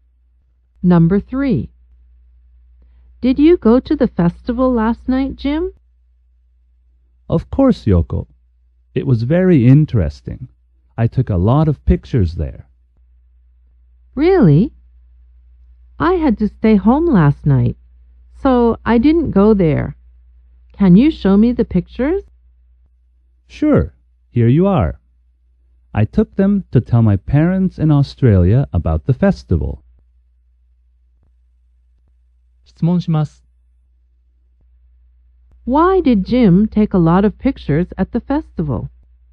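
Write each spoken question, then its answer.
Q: Why did Jim take a lot of pictures at the festival?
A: To tell his parents in Australia about the festival.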